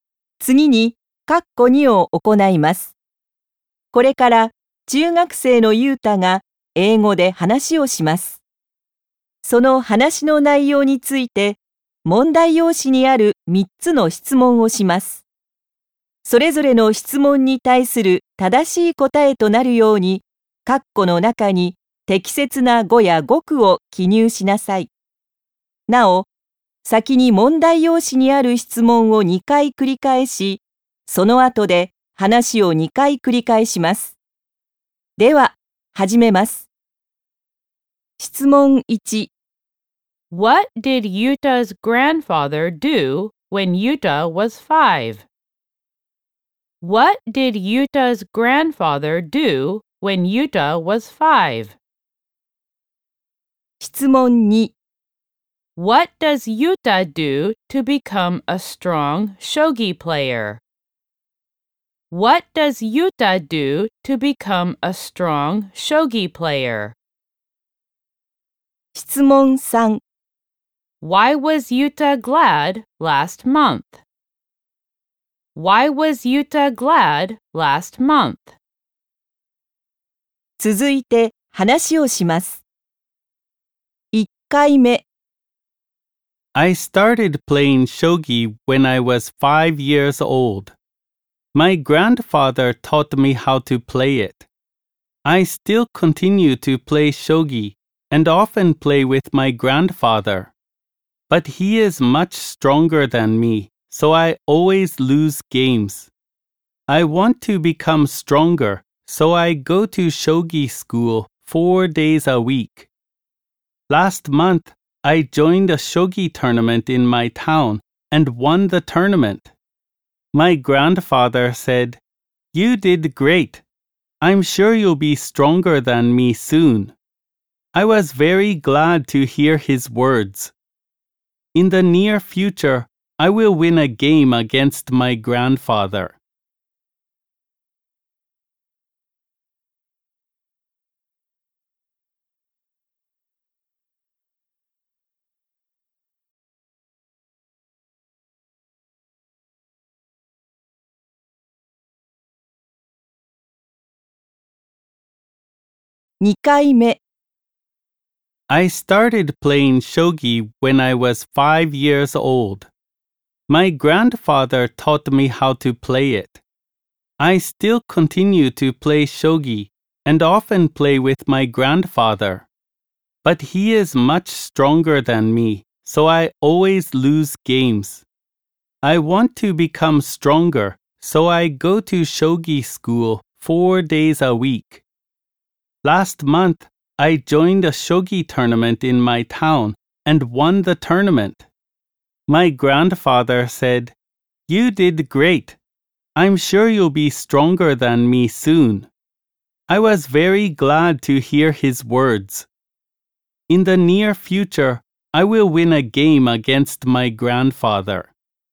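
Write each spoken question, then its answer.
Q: What did Yuta's grandfather do when Yuta was 5?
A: He taught Yuta how to play shogi

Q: What does Yuta do to become a strong shogi player?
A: He goes to shogi school four days a week

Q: Why was Yuta glad last month?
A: Because his grandfather said he did great and would soon be stronger than him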